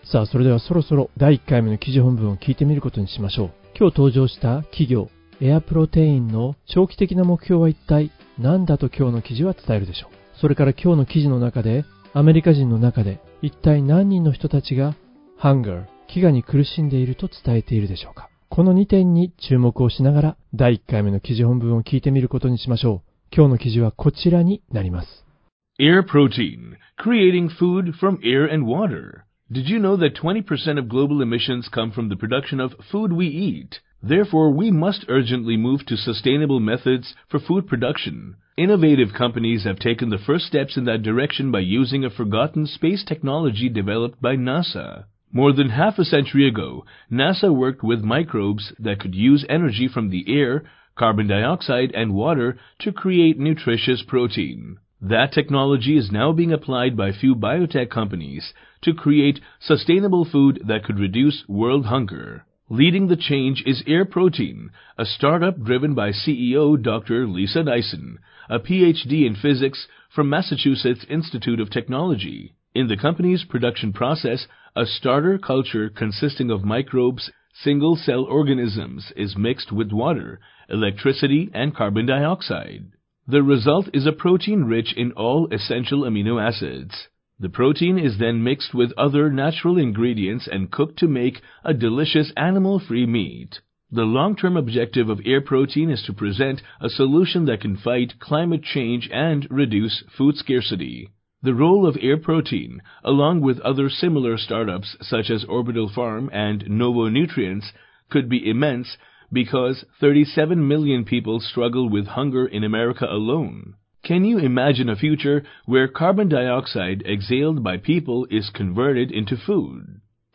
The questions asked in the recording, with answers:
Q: 今日登場した企業、エアプロテインの長期的な目標は一体何だと今日の記事は伝えるでしょう。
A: The long term objective of Air Protein is to present a solution that can fight climate change and reduce food scarcity.

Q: それから今日の記事の中で、アメリカ人の中で一体何人の人たちが hunger、飢餓に苦しんでいると伝えているでしょうか。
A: In America alone アメリカだけで37ミリオン3700万人の人たちが飢えと戦っている